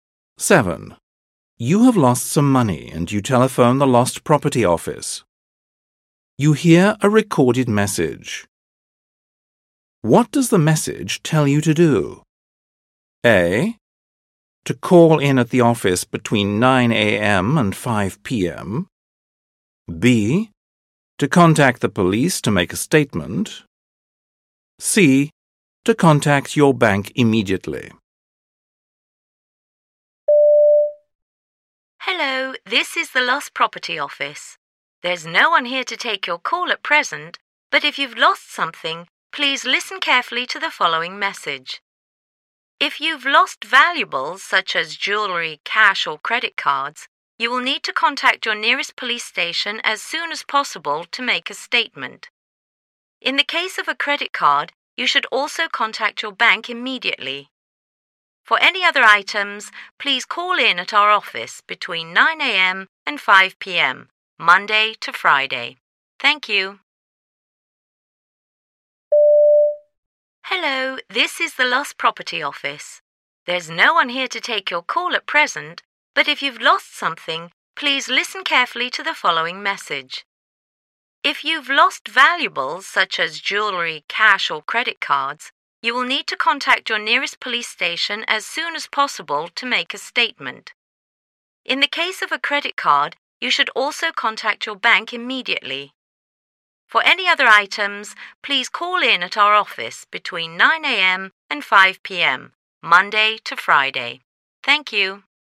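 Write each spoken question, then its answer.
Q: What does the message tell you to do?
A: B: To contact the police to make a statement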